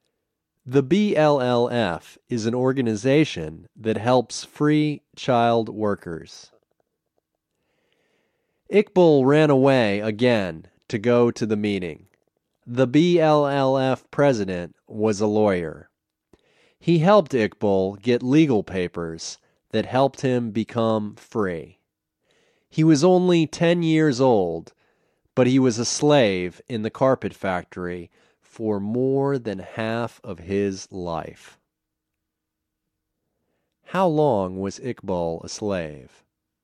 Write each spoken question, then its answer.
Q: How long was Iqbal a slave?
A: He was a slave for more than half of his life.